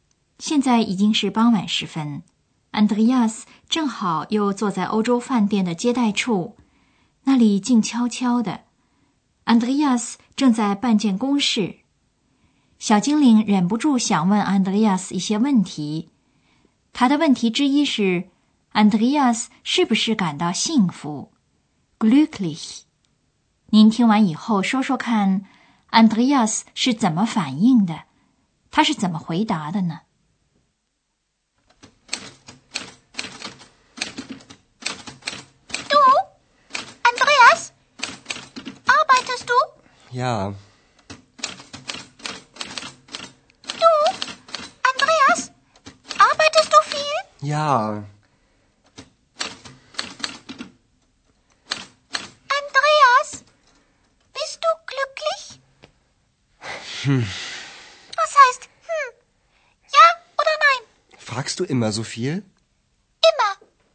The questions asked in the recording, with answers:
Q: Andreas 是怎么反应的?他是怎么回答的呢?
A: 对于小精灵的问题, Andreas 回答得吞吞吐吐,含含糊糊,而且还反问小精灵他是不是经常这样问个没完没了的。